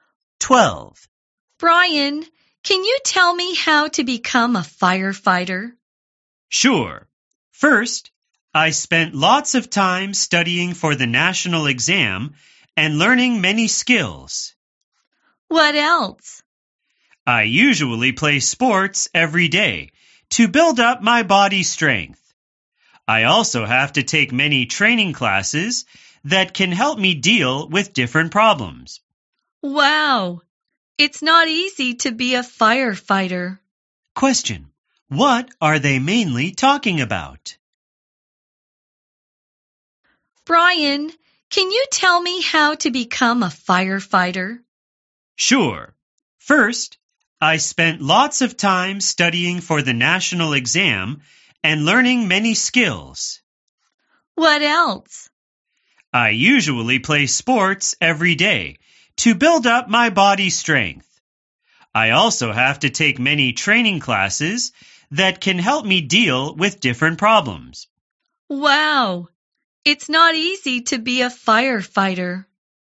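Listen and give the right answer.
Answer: How to become a firefighter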